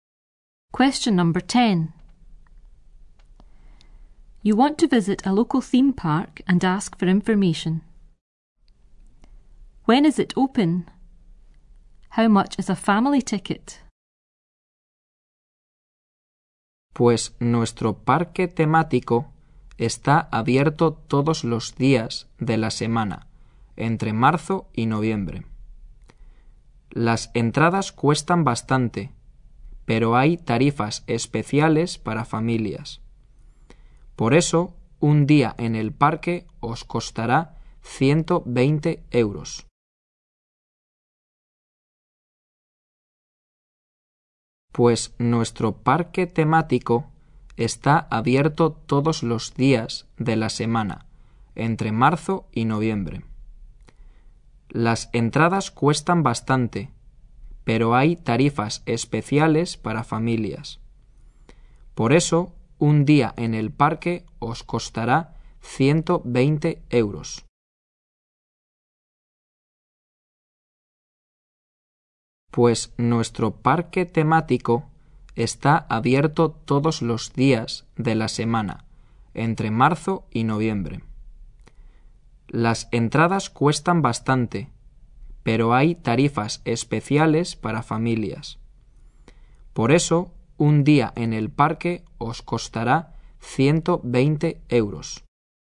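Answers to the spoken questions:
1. Every day, March to November
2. 120 euros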